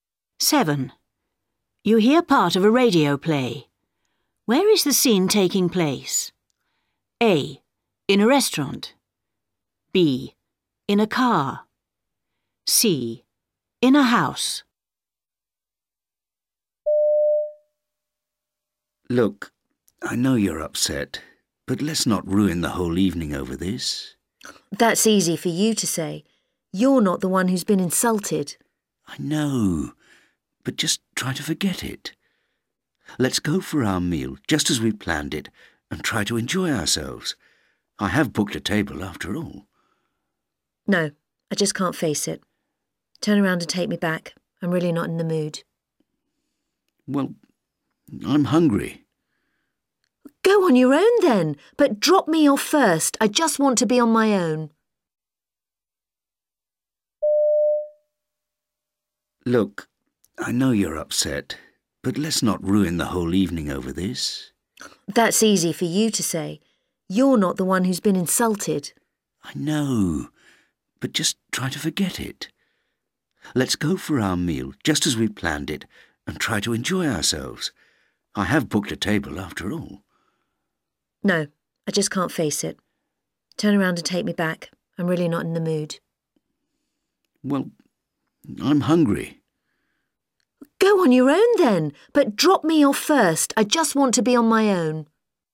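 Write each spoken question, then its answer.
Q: Where is the scene taking place?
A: B: In a car.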